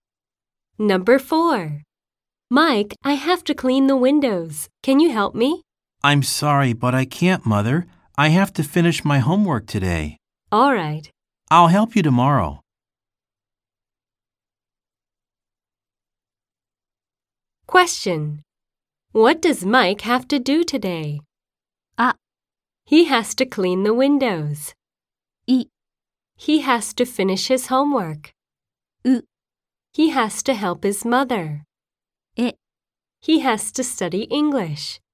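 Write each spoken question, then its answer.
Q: What does Mike have to do today?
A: I: He has to finish his homework.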